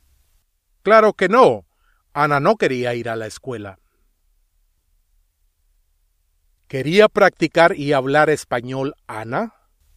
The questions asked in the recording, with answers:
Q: ¿Quería practicar y hablar español Ana?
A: Sí.